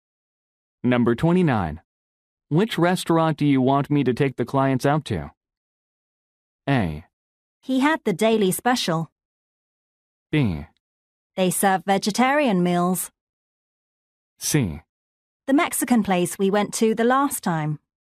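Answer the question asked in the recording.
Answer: C: The Mexican place we went to the last time.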